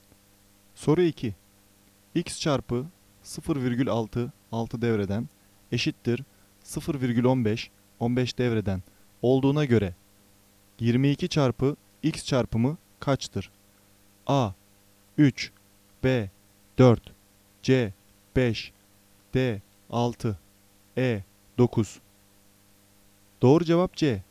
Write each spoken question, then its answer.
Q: X çarpı 0,6 6 devreden eşittir 0,15 15 devreden olduğuna göre 22 çarpı X çarpımı kaçtır?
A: Doğru cevap C. 5